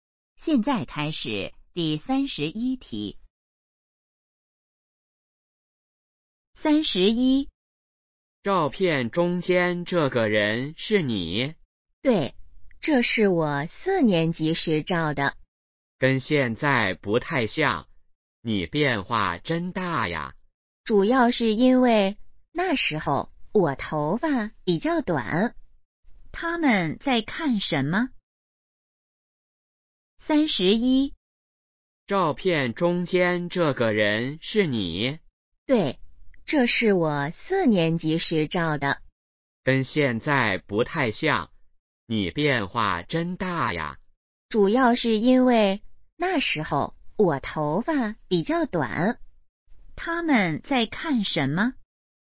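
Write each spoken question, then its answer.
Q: 他们在看什么?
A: 照片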